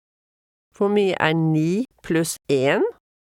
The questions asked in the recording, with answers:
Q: Hvor mye 9 pluss 1?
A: 10.